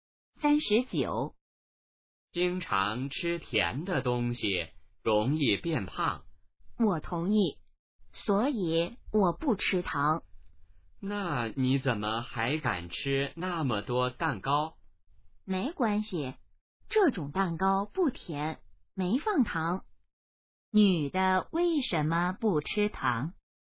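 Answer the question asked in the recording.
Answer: 怕变胖(经常吃甜的东西容易变胖)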